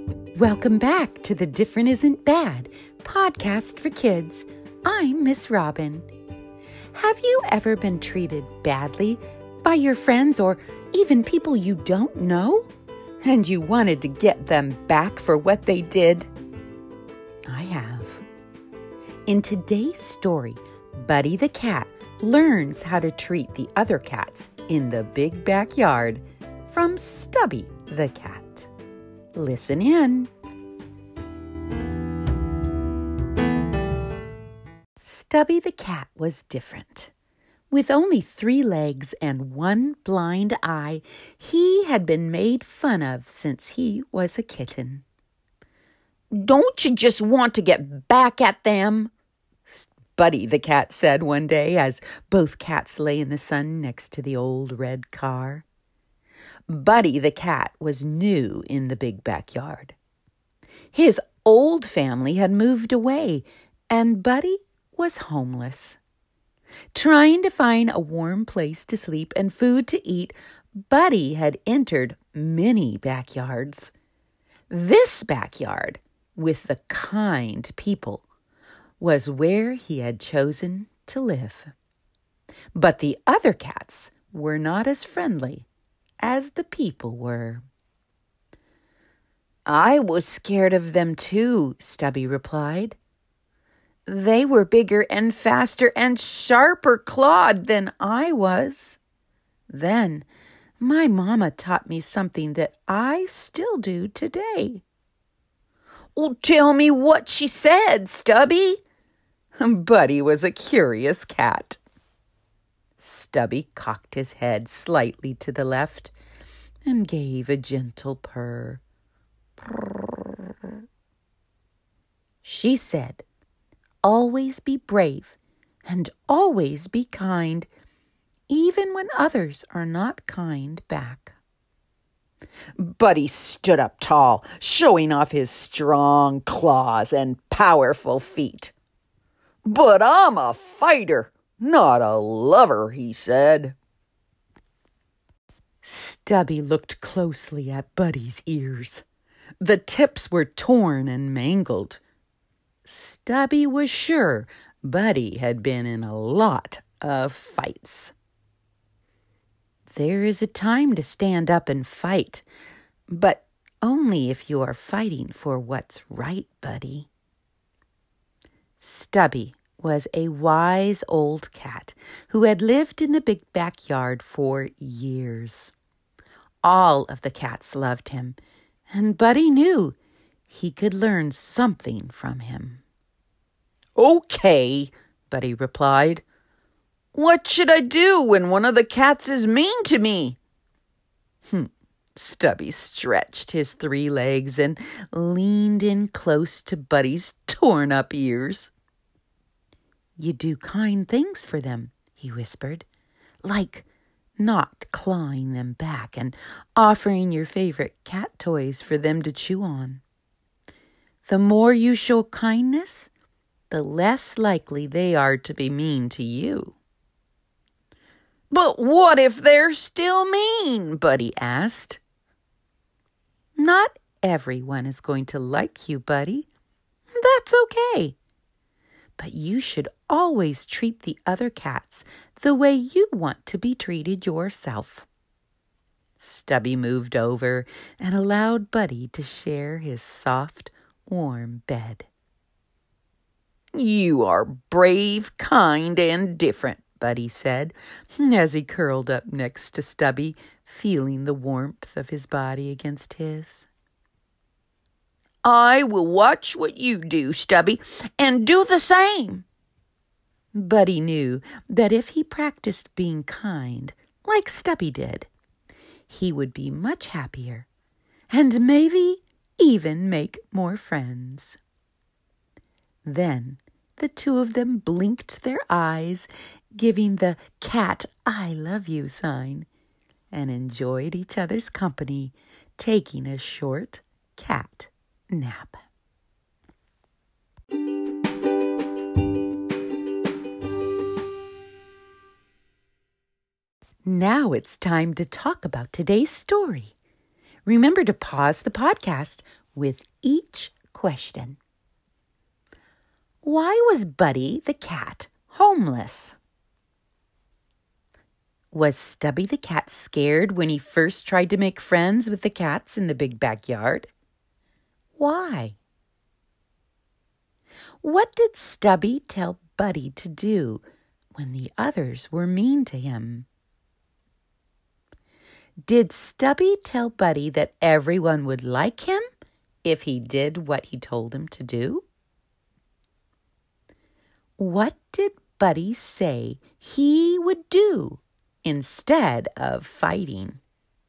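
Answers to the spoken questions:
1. His old family had moved away.
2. Yes, because they were bigger, faster and sharper clawed than he was.
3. Do kind things for them, like not clawing back and offering his favorite cat toys.
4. No, not everyone is going to like him.
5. Watch what Stubby does and do the same (be kind).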